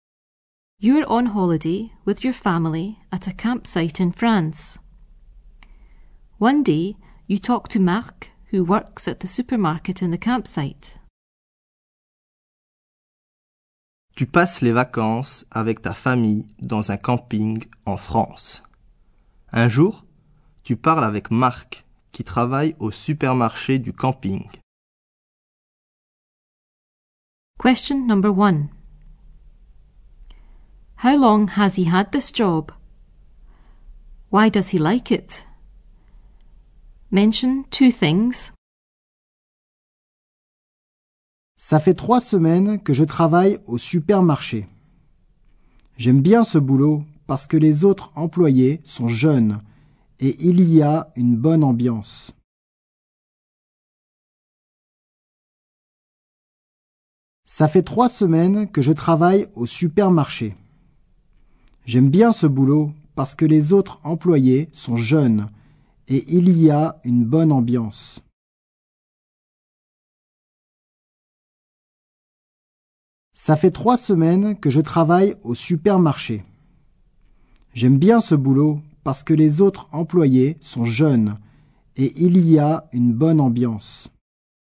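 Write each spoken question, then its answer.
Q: How long has he had this job?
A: 3 weeks

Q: Why does he like it? Mention two things.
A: The other employees are young and there is a good atmosphere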